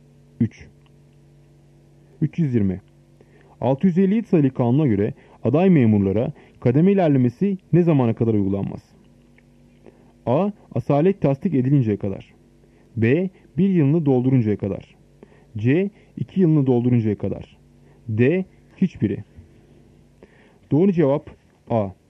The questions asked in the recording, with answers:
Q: 650 sayılı kanuna göre aday memurlara kademe ilerlemesi ne zamana kadar uygulanmaz?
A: Doğru cevap A. Asalet tasdik edilinceye kadar.